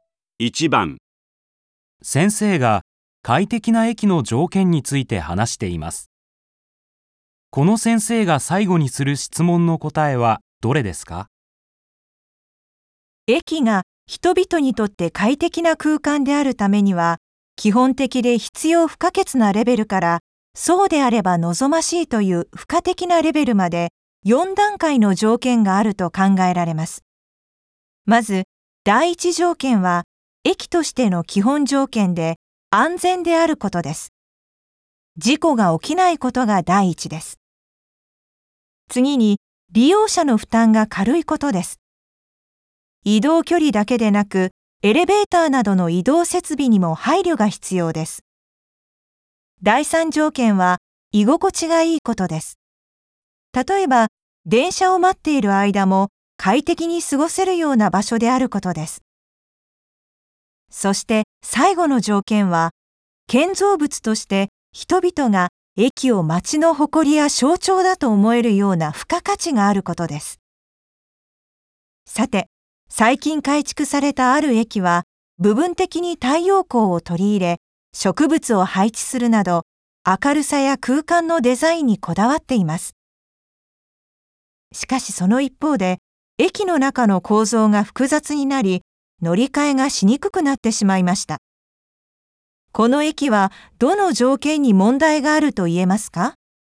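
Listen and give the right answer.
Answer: 第二条件:利用者の負担が軽いこと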